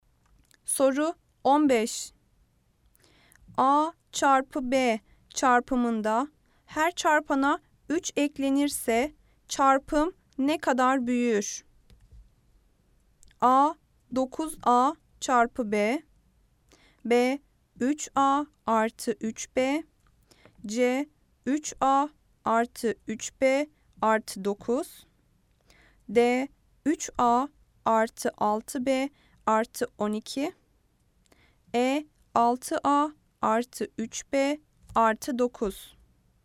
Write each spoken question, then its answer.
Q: A çarpı B çarpımında her çarpana 3 eklenirse çarpım ne kadar büyür?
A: Cevap Ceyhan 3A artı 3B artı 9.